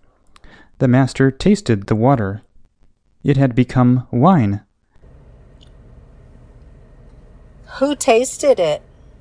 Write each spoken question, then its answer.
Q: Who tasted it?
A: The master tasted it.